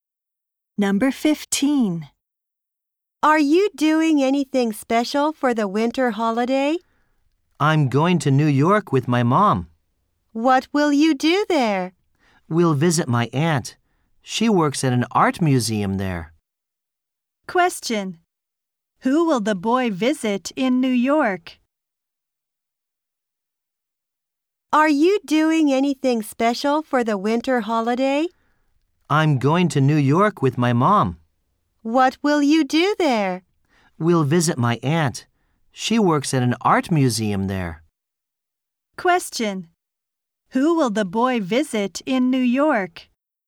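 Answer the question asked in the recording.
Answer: His aunt.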